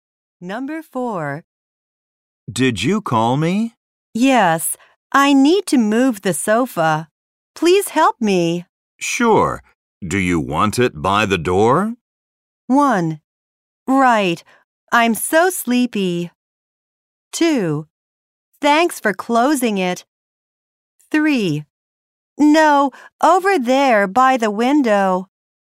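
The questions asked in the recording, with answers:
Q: Sure. Do you want it by the door?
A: 3: No, over there by the window.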